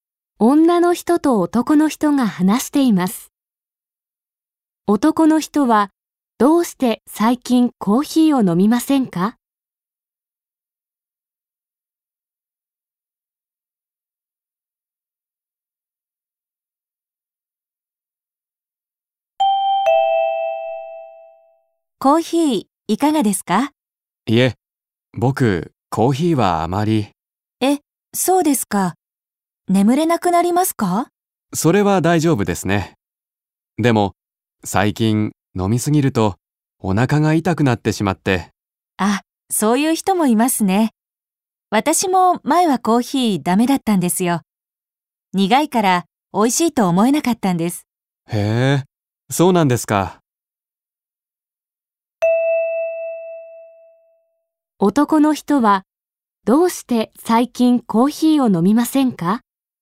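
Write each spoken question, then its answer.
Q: 男の人は、どうして最近コーヒーを飲みませんか?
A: 飲みすぎるとお腹が痛くなるから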